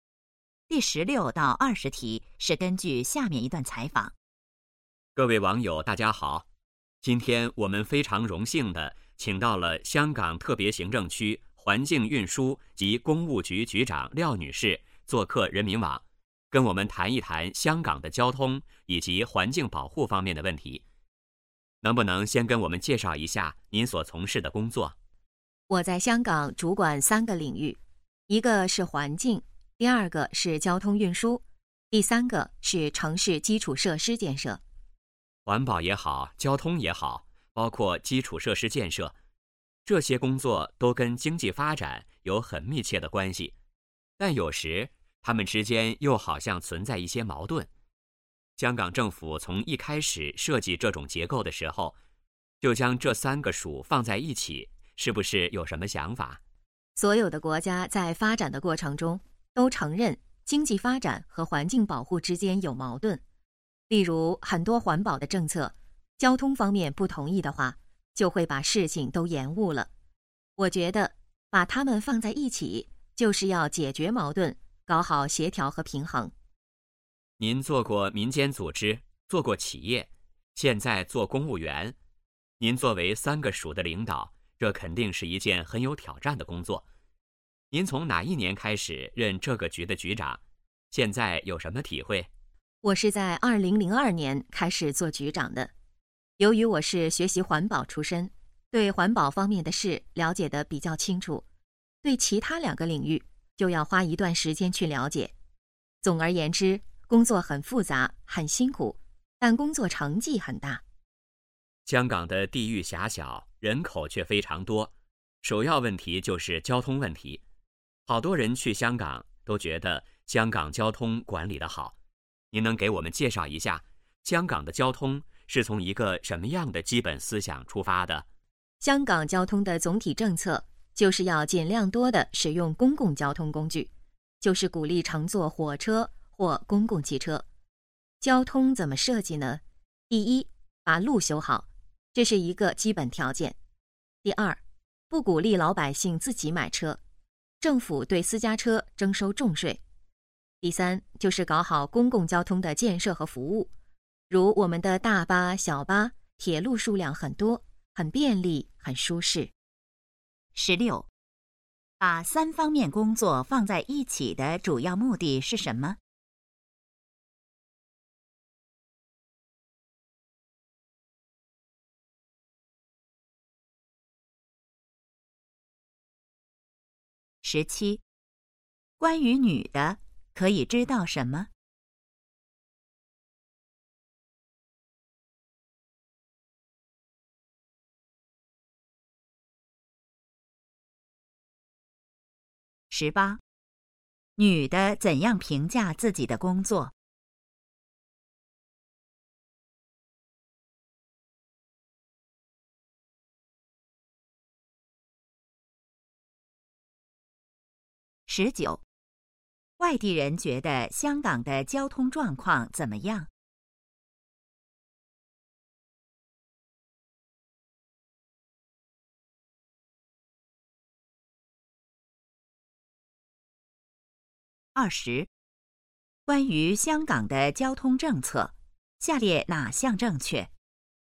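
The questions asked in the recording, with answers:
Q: 把三方面工作放在一起的主要目的是什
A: 解决矛盾,搞好协调和平衡

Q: 女的怎样评价自己的工作?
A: 很复杂、很辛苦,但成绩很大

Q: 外地人觉得香港的交通状况怎么样?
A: 管理得好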